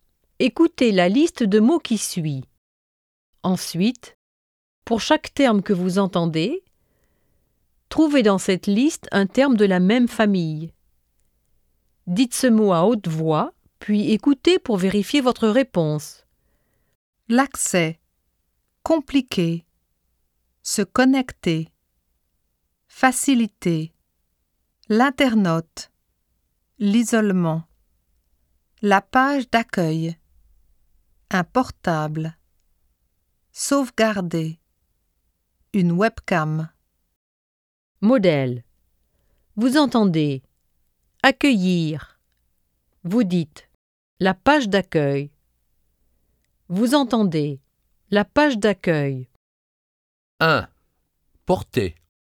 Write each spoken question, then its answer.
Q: Porter.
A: Un portable.